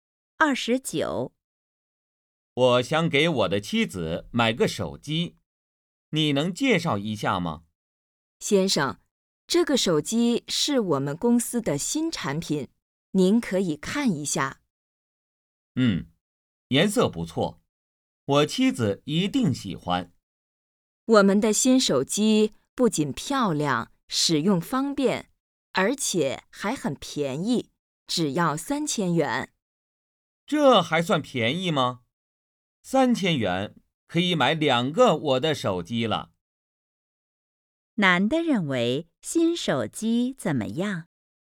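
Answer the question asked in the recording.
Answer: 太贵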